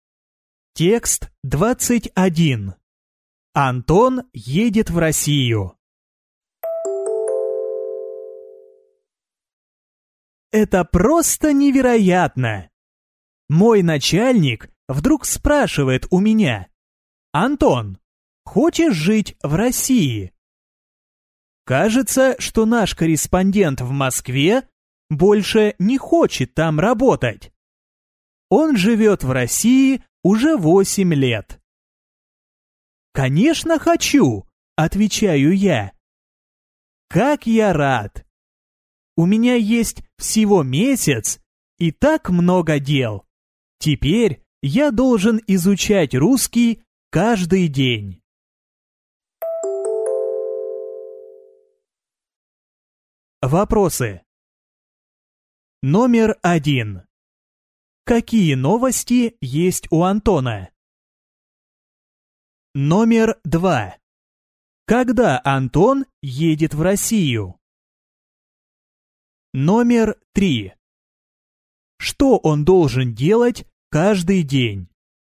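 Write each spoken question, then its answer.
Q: Какие новости есть у Антона?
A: Он поедет жить и работать корреспондентом в Россию (в Москву)

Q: Когда Антон едет в Россию?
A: Через месяц

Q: Что он должен делать каждый день?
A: Изучать русский язык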